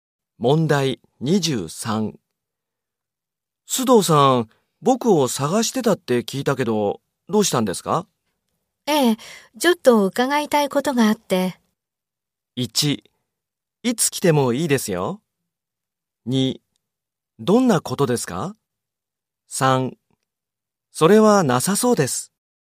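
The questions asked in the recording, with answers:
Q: 須藤さん、僕を探してたって聞いたけど、どうしたんですか?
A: 1: どんなことですか?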